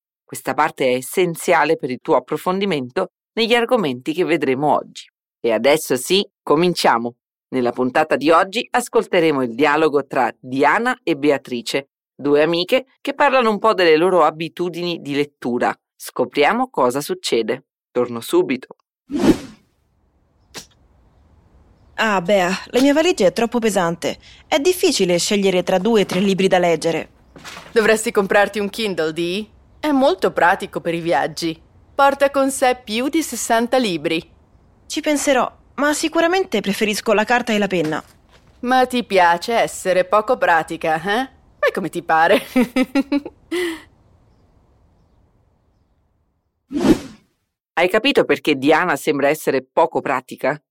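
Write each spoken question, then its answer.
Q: Hai capito perché Diana sembra essere poco pratica?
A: Perché preferisce i libri di carta (carta e penna) invece di comprare un Kindle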